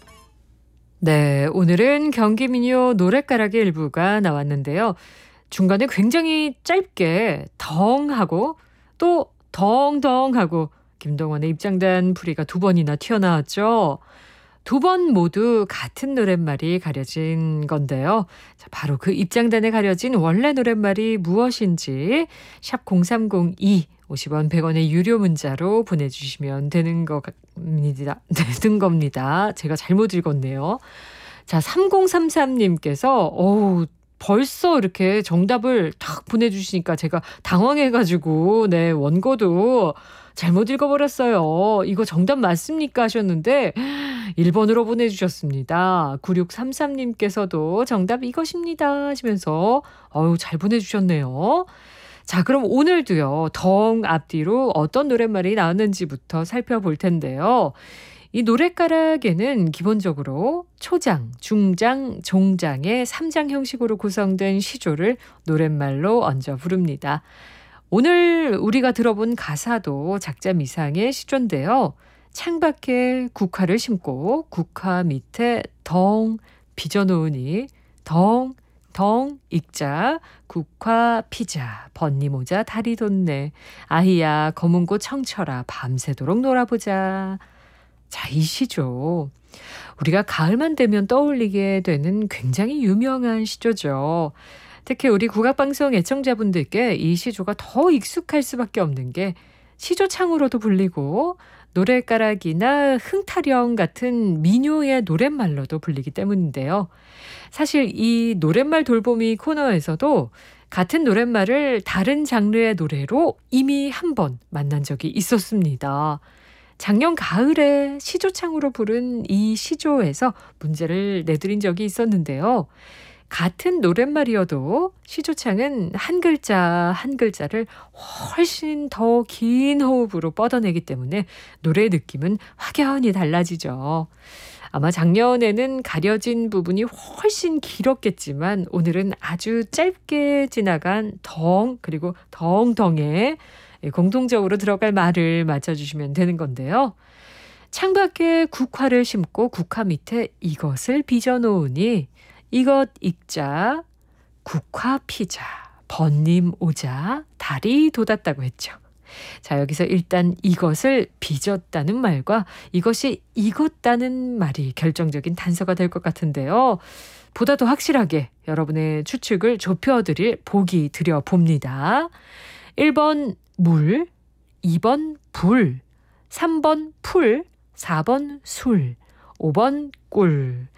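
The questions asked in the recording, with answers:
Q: 오늘은 아주 짧게 지나간 덩 그리고 덩덩에 공통적으로 들어갈 말을 맞춰주시면 되는 건데요.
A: 4: 술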